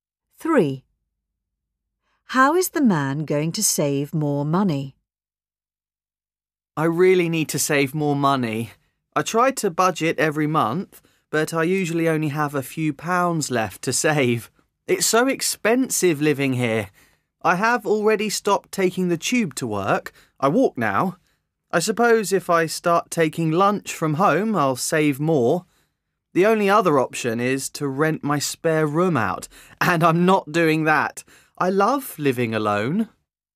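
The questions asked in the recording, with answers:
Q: How is the man going to save more money?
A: By taking lunch from home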